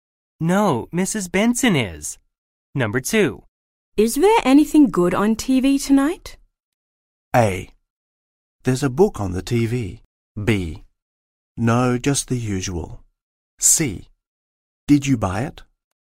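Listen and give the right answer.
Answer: B: No, just the usual.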